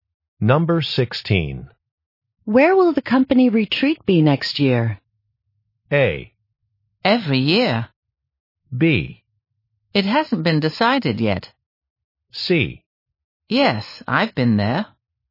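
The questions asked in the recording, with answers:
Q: Where will the company retreat be next year?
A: B: It hasn't been decided yet.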